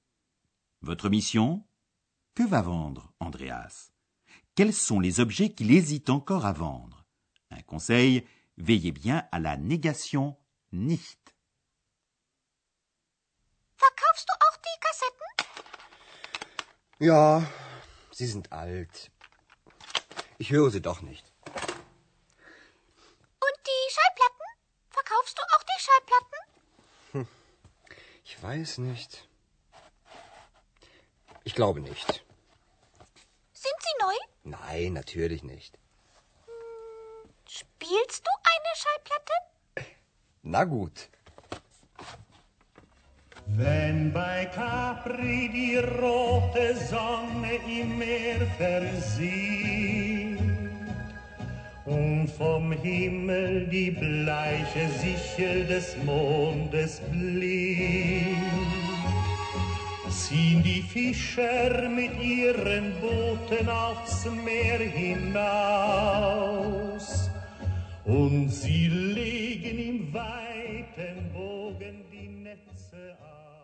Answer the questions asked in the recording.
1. Andreas veut donc vendre les cassettes.
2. Pour le disque, il ne sait pas encore très bien s'il veut les vendre ou non.